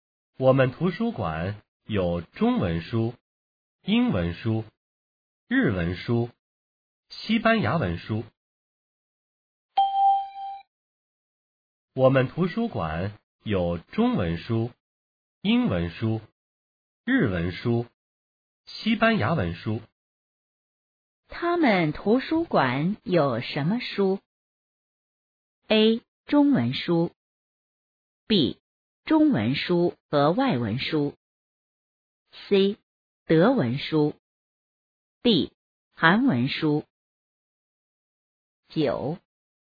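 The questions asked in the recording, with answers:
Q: 他们图书馆有什么书?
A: B: 中文书和外文书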